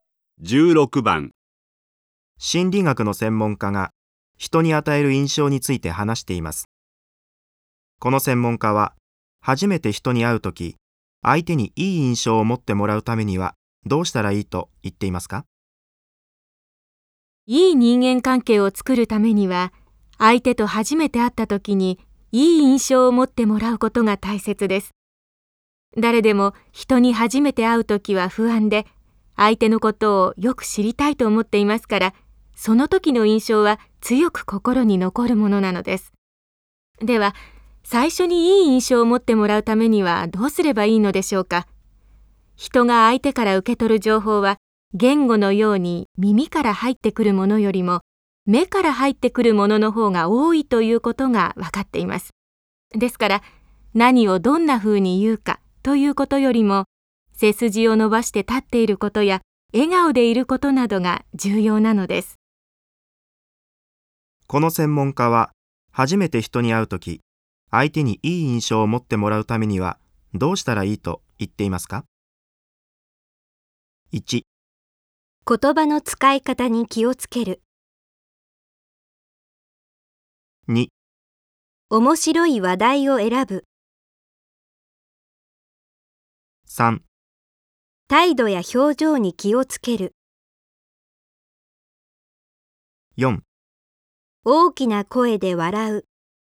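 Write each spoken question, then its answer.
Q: この専門家は初めて人に会うとき、相手にいい印象を持ってもらうためにはどうしたらいいと言っていますか?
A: 3: 態度や表情に気をつける。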